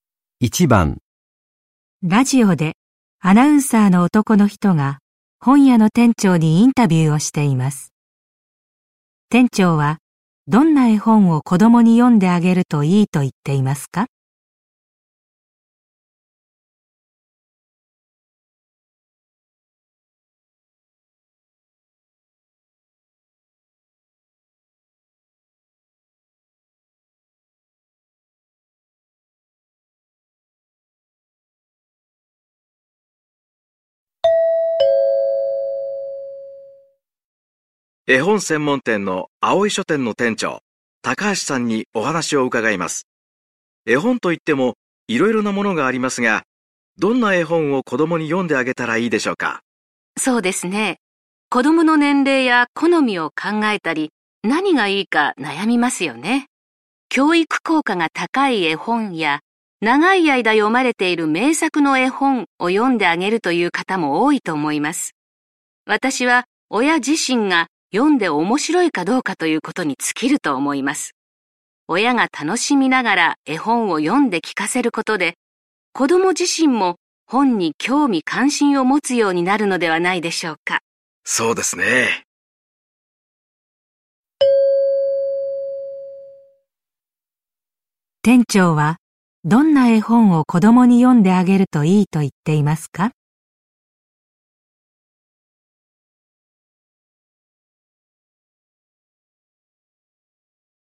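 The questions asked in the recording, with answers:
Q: 店長はどんな絵本を子供に読んであげるといいと言っていますか?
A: 親自身が読んで面白いと思う絵本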